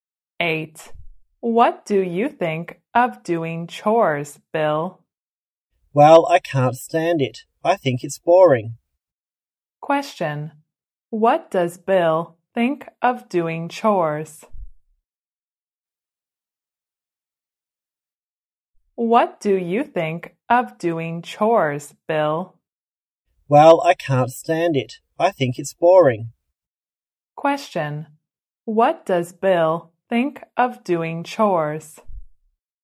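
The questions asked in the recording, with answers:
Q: what does Bill think of doing chores?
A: He can't stand it; it's boring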